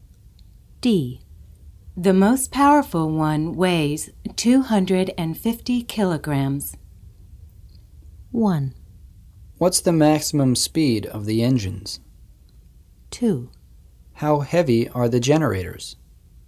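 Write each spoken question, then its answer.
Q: How heavy are the generators?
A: 2: How heavy are the generators?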